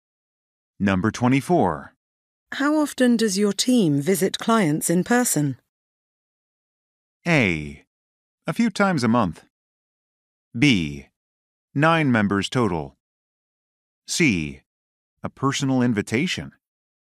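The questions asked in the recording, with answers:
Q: How often does your team visit clients in person?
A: A: A few times a month.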